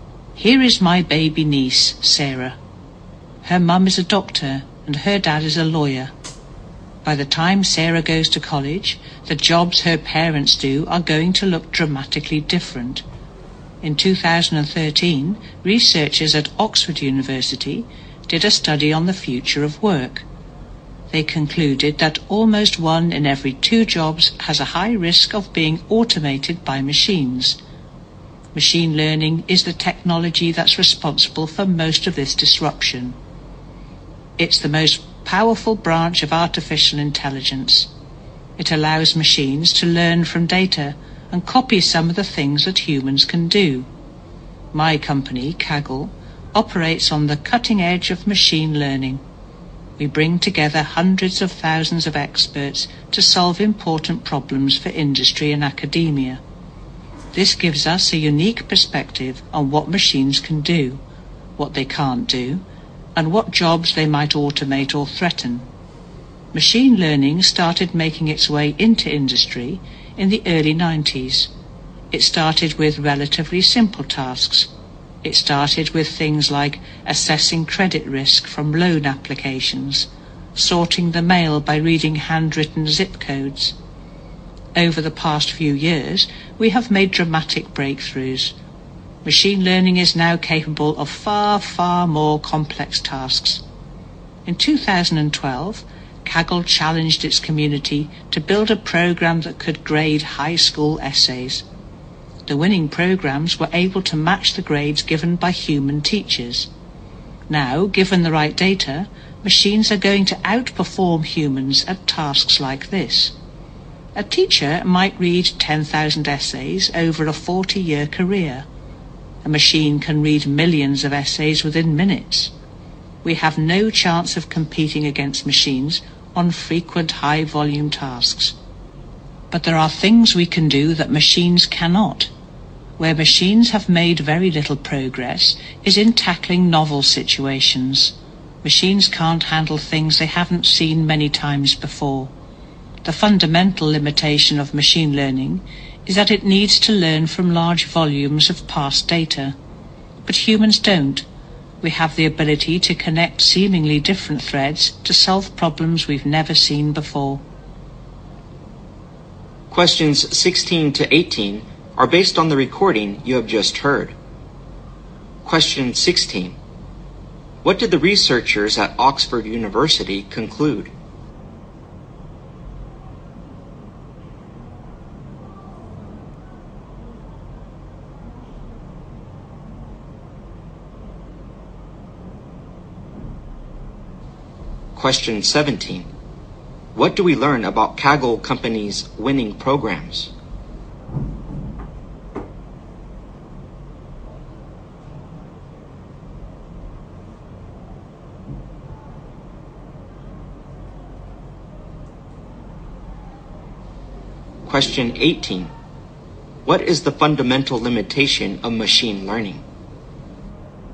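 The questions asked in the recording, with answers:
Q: What did the researchers at Oxford University conclude?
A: Almost one in two jobs has a high risk of being automated

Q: What do we learn about Kaggle Company's winning programs?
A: They could grade high school essays as well as human teachers

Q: What is the fundamental limitation of machine learning?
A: It needs to learn from large volumes of past data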